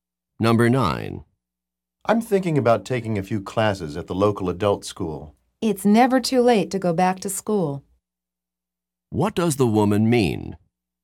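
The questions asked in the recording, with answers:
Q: What does the woman mean?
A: The man should take the classes; it's never too late to learn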